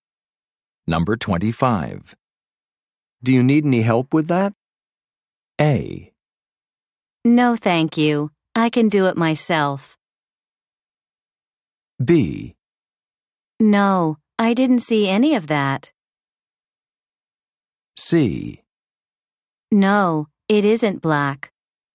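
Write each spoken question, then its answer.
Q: Do you need any help with that?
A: A: No, thank you. I can do it myself.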